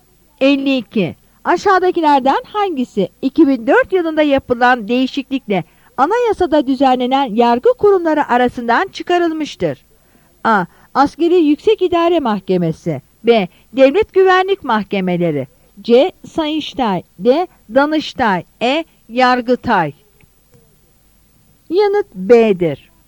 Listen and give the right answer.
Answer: Yanıt B'dir.